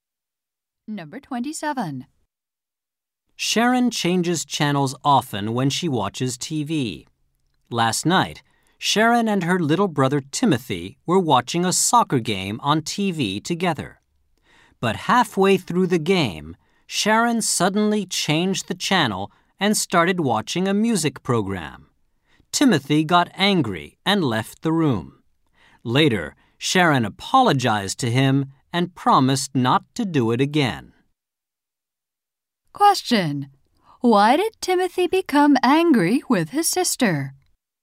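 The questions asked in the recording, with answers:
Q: Why did Timothy become angry with his sister?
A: She changed the channel during the soccer game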